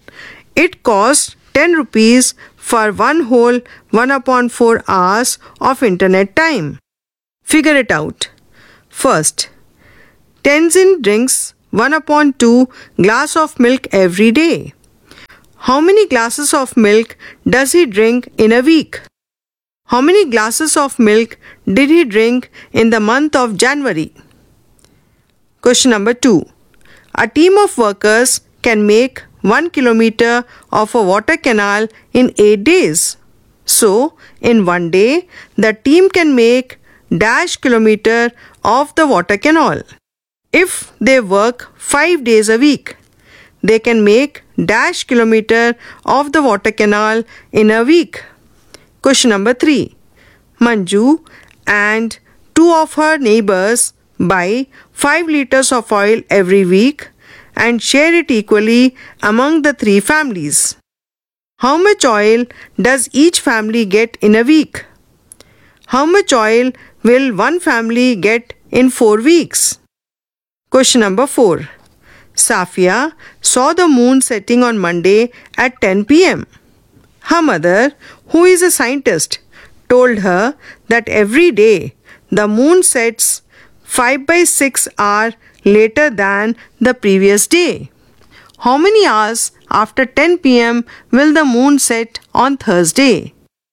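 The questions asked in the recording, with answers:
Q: How many glasses of milk does he drink in a week?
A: 7/2 (3 1/2) glasses

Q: How many glasses of milk did he drink in the month of January?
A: 31/2 (15 1/2) glasses

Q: How much oil does each family get in a week?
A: 5/3 liters

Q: How much oil will one family get in 4 weeks?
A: 20/3 liters

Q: How many hours after 10 p.m. will the moon set on Thursday?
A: 5/2 hours (2 1/2 hours)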